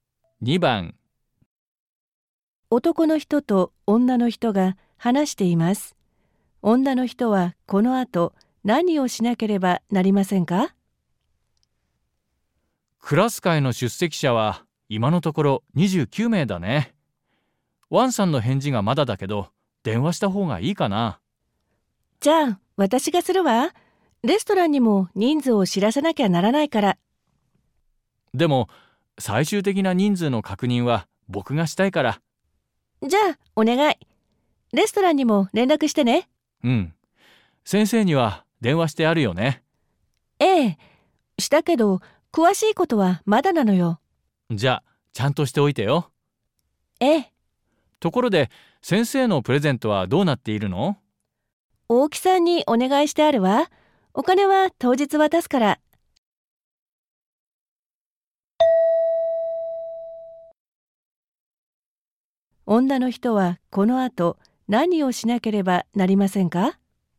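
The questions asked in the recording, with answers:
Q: 女の人はこの後何をしなければなりませんか?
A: 先生に詳しいことを連絡する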